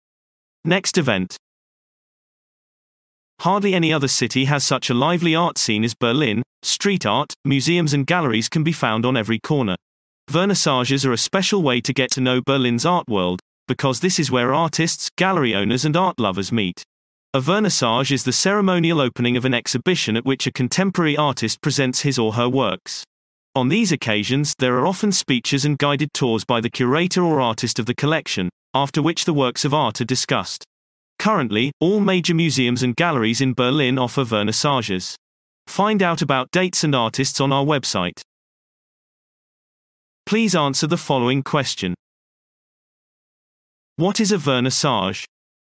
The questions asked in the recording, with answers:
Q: What is a vernissage?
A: A vernissage is the formal opening of an exhibition at which a contemporary artist presents his or her work.